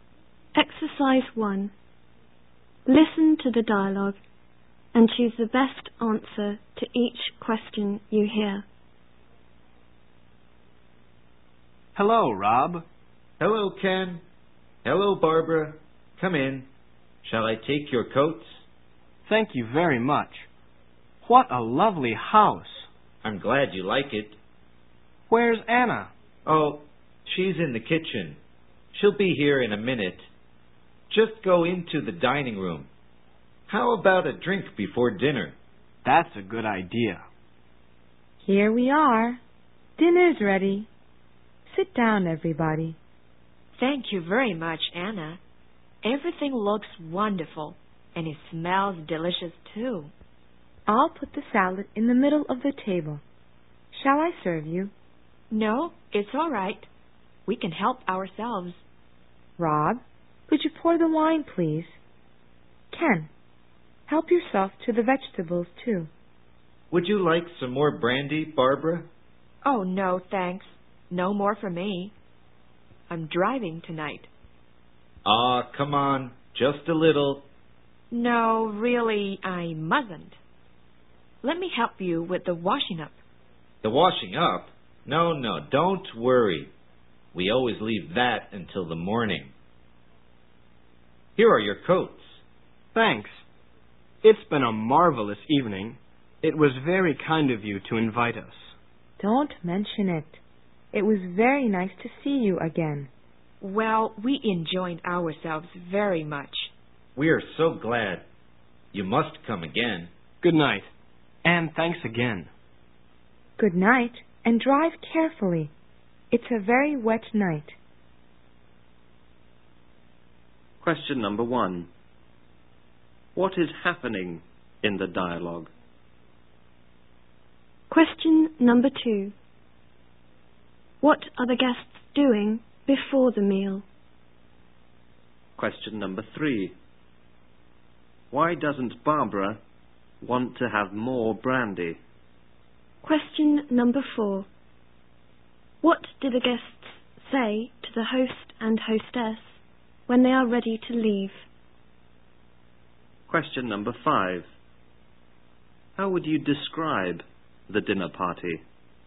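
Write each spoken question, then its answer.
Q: What is happening in the dialogue?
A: A dinner party: Rob and Anna have invited Ken and Barbara to dinner at their home

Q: What are the guests doing before the meal?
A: Having a drink

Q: Why doesn't Barbara want to have more brandy?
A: Because she is driving tonight

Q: What do the guests say to the host and hostess when they are ready to leave?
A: It's been a marvelous evening; it was very kind of you to invite us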